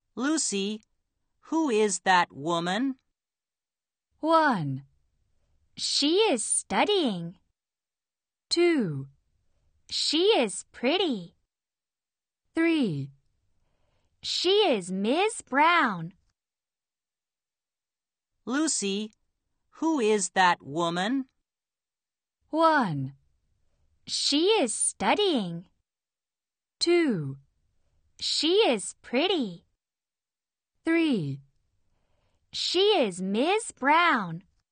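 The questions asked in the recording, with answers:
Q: Lucy, who is that woman?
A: 3: She is Ms. Brown.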